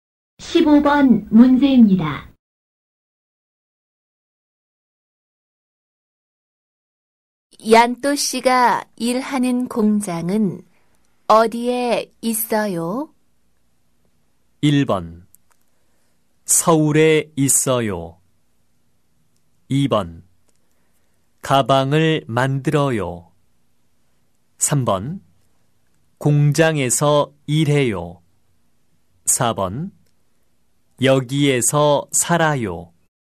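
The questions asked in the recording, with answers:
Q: 얀또 씨가 일하는 공장은 어디에 있어요?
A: 1: 서울에 있어요.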